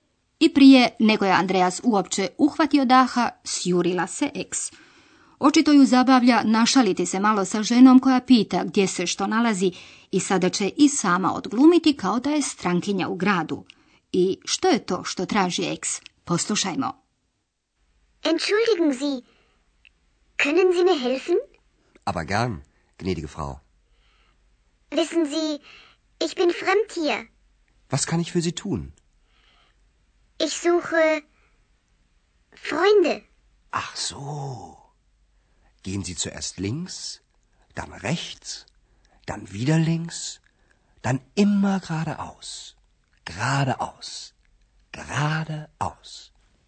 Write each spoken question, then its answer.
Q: I što je to što traži eks?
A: Eks kaže da traži prijatelje.